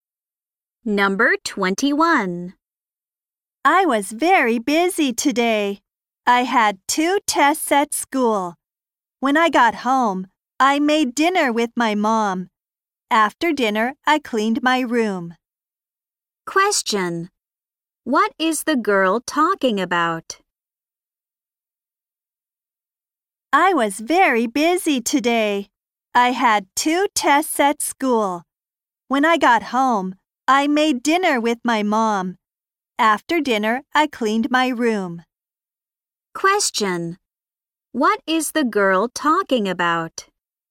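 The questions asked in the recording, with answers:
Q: What is the girl talking about?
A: Her busy day.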